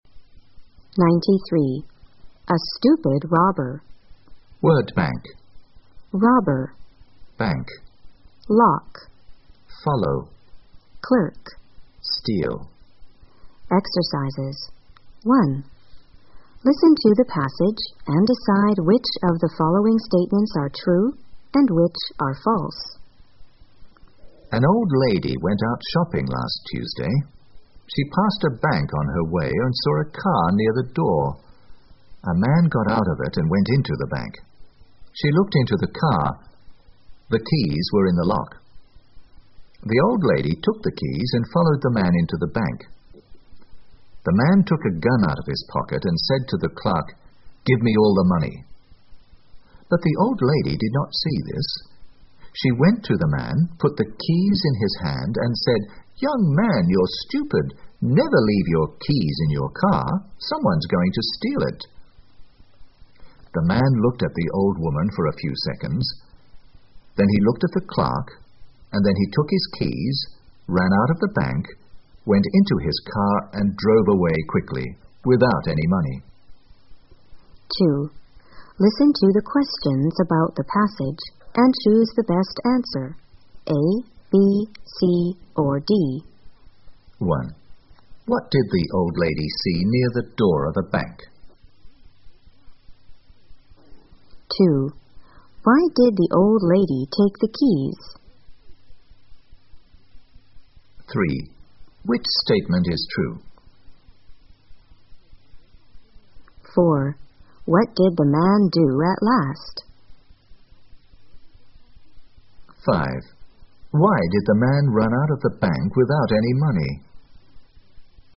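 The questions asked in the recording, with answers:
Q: What did the old lady see near the door of the bank?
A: A car

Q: What did the man do at last?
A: He took his keys, ran out of the bank and drove away quickly without any money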